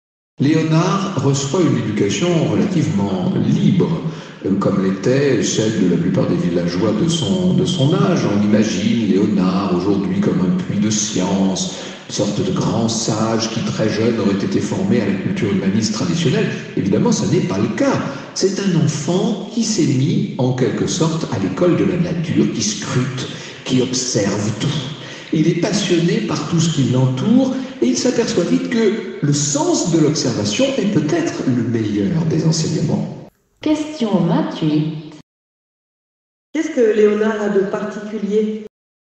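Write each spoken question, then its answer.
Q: Qu'est-ce que Léonard a de particulier ?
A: Il apprend à l'école de la nature, en observant tout.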